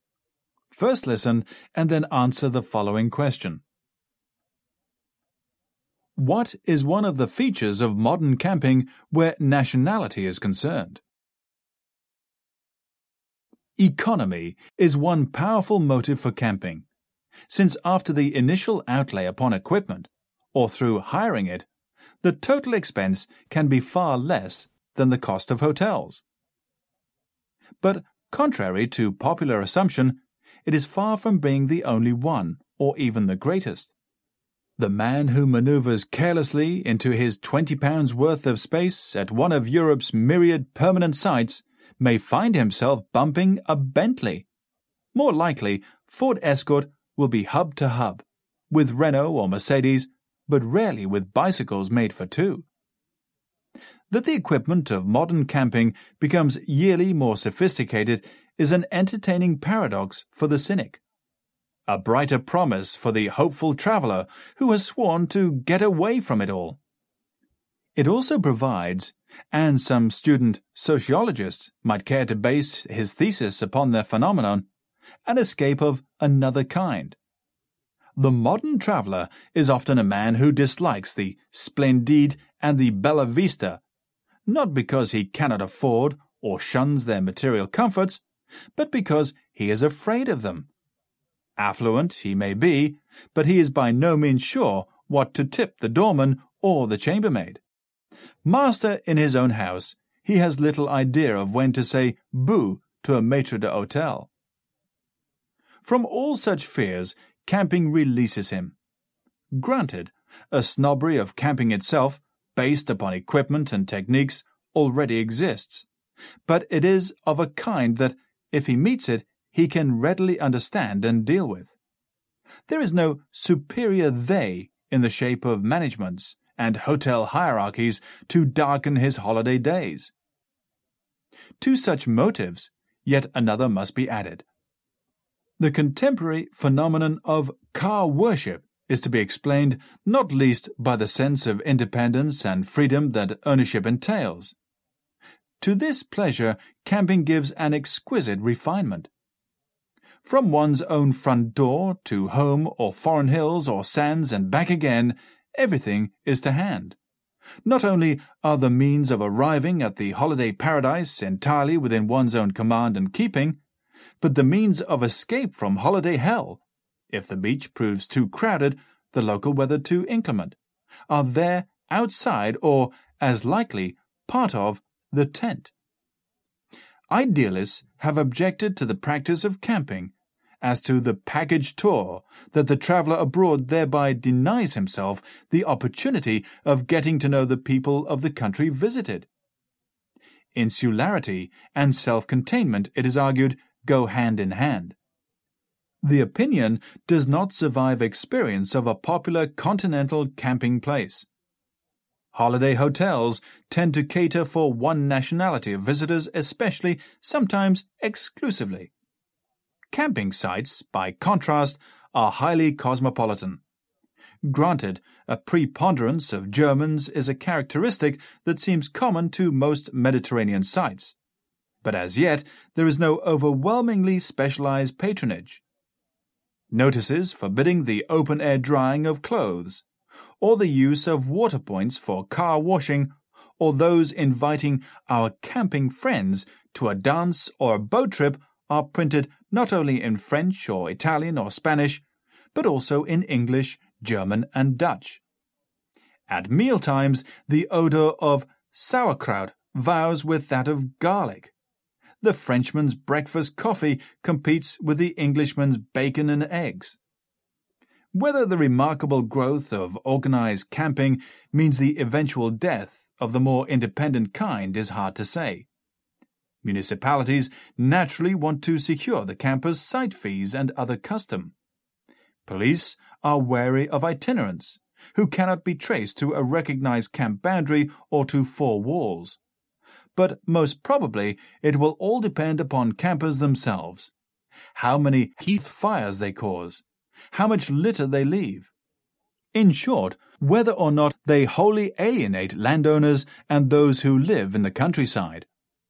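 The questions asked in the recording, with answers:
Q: What is one of the features of modern camping where nationality is concerned?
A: Camping sites are highly cosmopolitan, with many nationalities mixing together.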